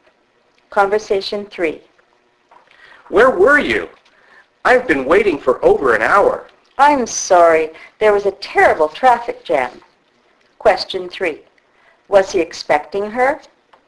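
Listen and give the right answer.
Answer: Yes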